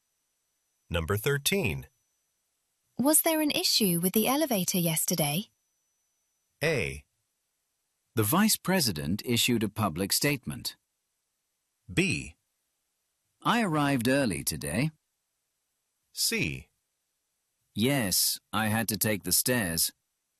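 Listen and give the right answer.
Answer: C: Yes, I had to take the stairs.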